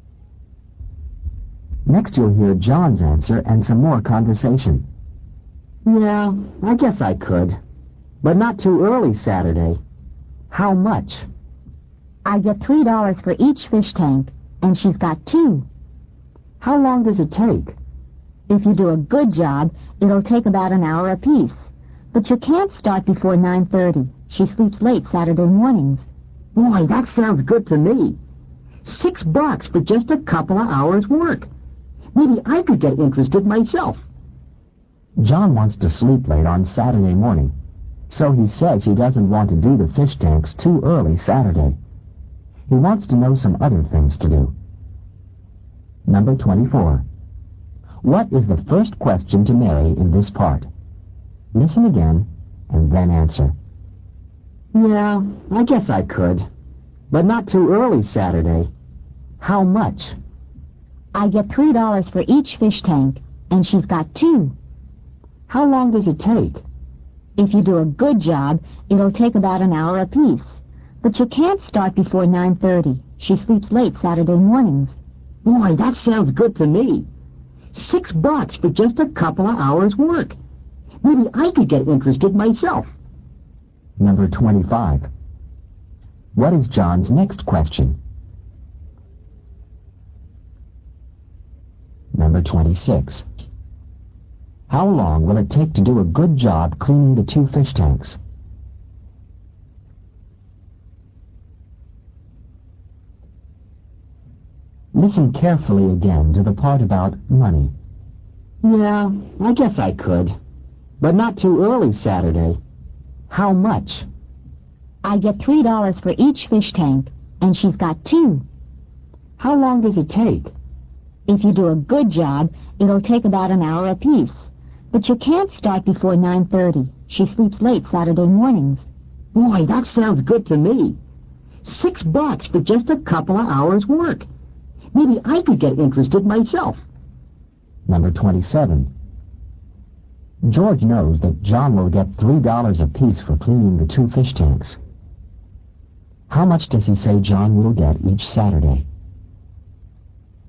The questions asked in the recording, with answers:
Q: What is the first question to Mary in this part?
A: Number 24, he asks, how much?

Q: What is John's next question?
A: Number 25, how long does it take?

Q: How long will it take to do a good job cleaning the two fish tanks?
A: Number 26, about an hour apiece, or about 1 hour apiece.

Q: How much does he say John will get each Saturday?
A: Number 27, $6.